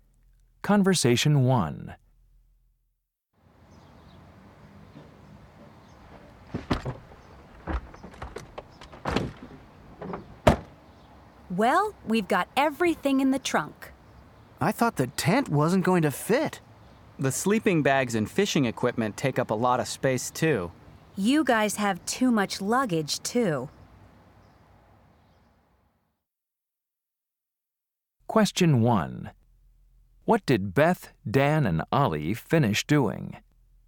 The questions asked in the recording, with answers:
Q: What did Beth, Dan, and Ollie finish doing?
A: We just got everything in the car, and it's already almost lunchtime.